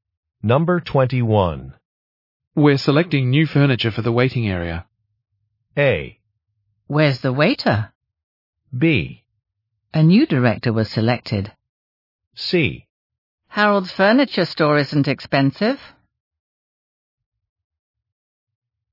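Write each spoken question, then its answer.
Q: We're selecting new furniture for the waiting area.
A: C: Harold's furniture store isn't expensive.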